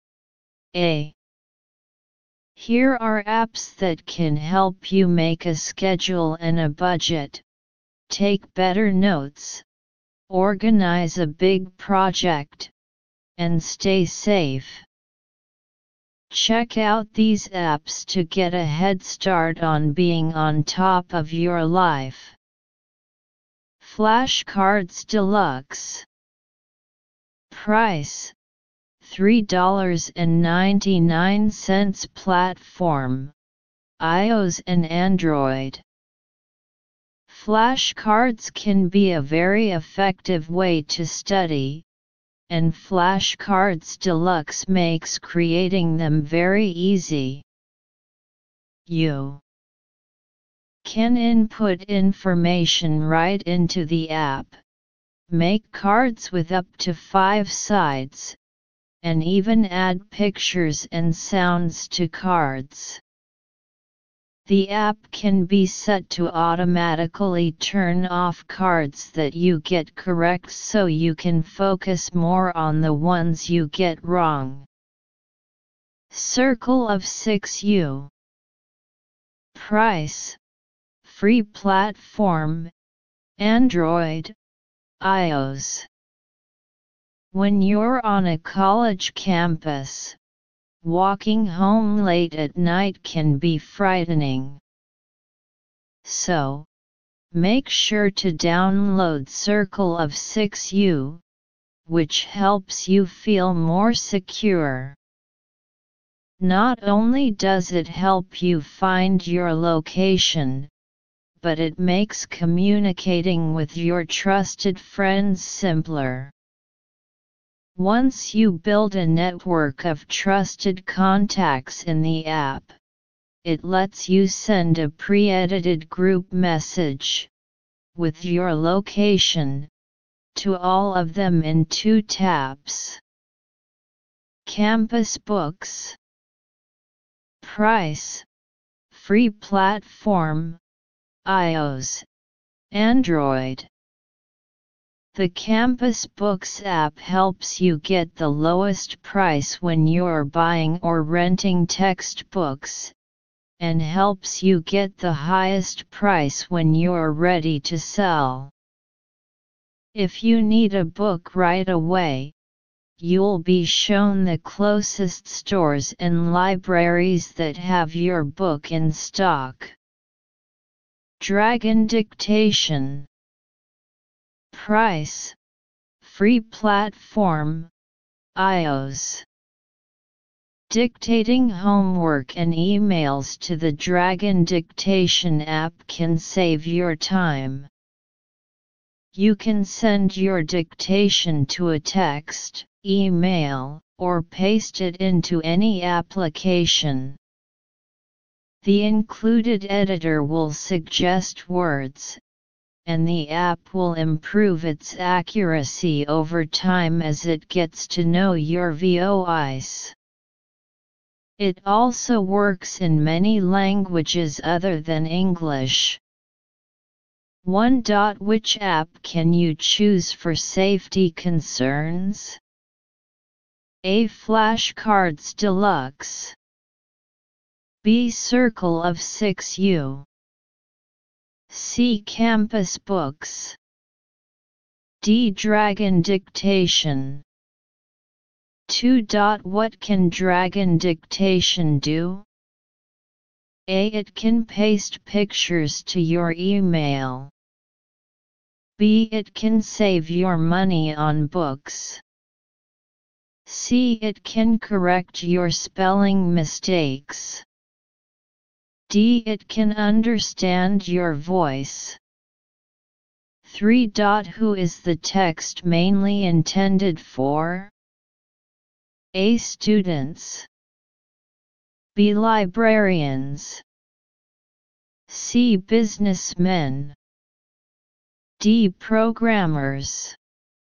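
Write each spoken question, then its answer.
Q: Which app can you choose for safety concerns?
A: B: Circle of 6U.

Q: What can dragon dictation do?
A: D: It can understand your voice.

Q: Who is the text mainly intended for?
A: A: Students.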